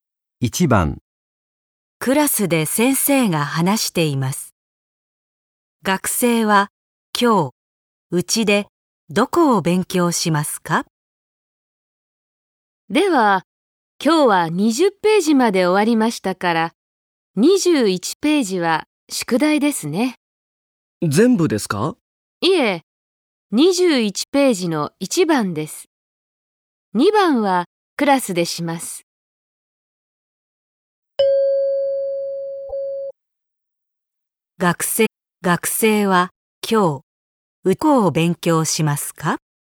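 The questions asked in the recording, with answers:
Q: 学生は今日、どこを勉強しますか?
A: 21ページの1番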